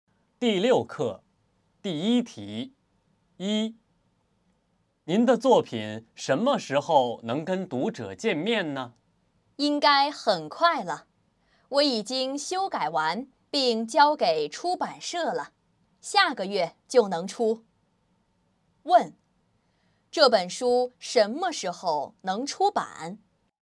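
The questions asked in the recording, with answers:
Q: 这本书什么时候能出版?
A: 下个月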